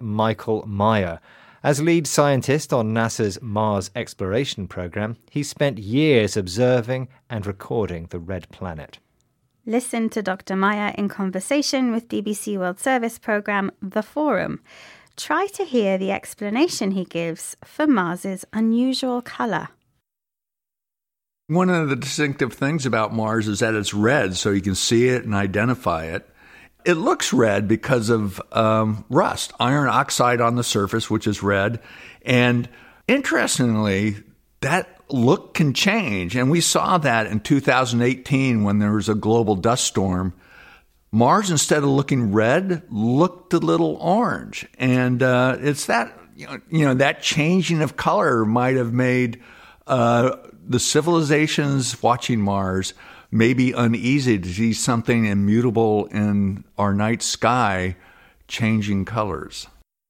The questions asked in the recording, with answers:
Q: Try to hear the explanation he gives for Mars's unusual colour.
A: Yes, it's red because of rust, a reddish chemical substance called iron oxide that occurs when metals react with water and air.